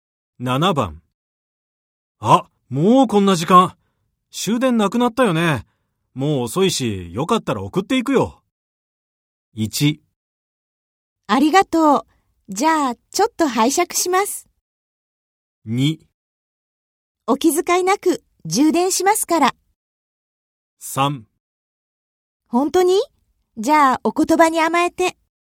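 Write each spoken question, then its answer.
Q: あ、もうこんな時間。終電なくなったよね。もう遅いし、よかったら送っていくよ。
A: 3: 本当に?じゃあ、お言葉に甘えて。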